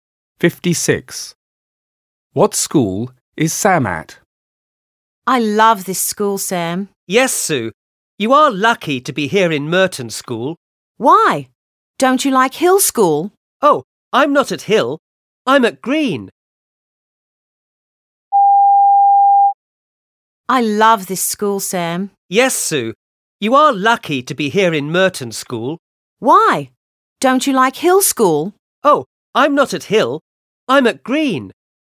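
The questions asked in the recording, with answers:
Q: What school is Sam at?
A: Green School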